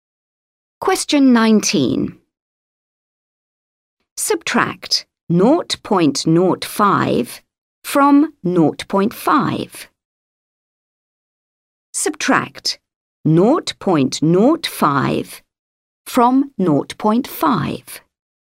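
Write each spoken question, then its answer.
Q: Subtract 0.05 from 0.5.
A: 0.45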